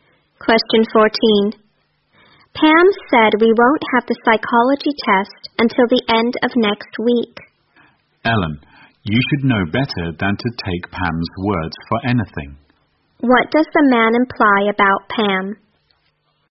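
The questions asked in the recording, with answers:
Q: What does the man imply about Pam?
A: Pam is not reliable; her words can't be trusted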